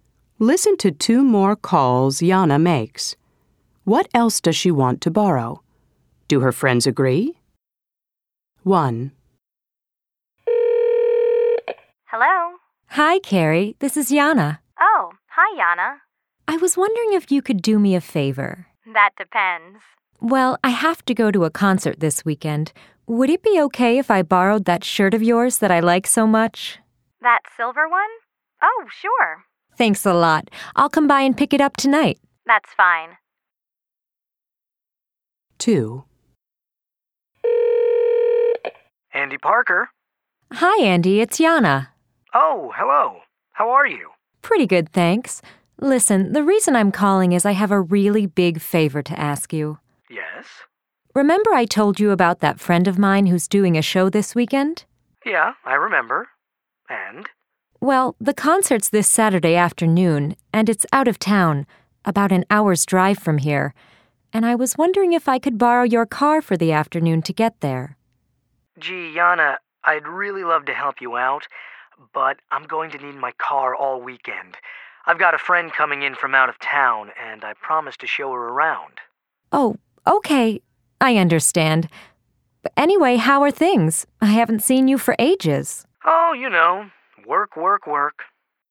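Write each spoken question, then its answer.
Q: What else does she want to borrow?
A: Carrie's silver shirt and Andy's car

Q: Do her friends agree?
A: Carrie agrees; Andy says no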